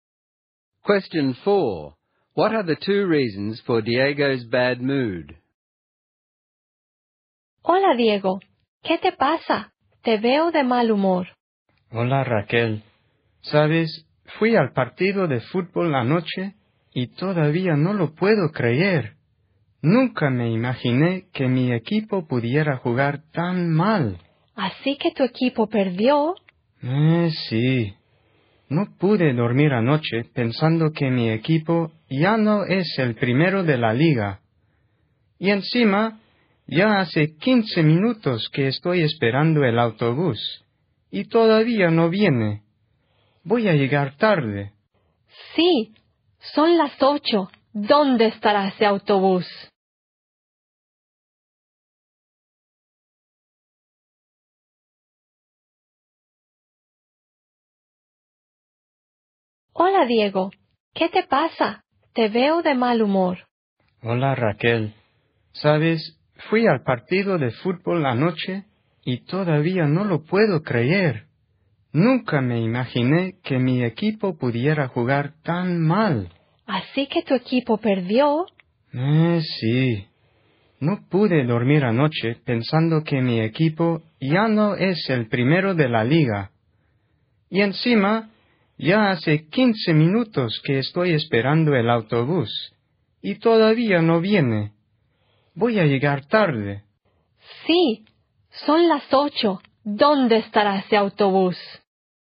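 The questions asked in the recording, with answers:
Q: What are the two reasons for Diego's bad mood?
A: His football team lost and is no longer top of the league, and his bus has been late for 15 minutes so he'll be late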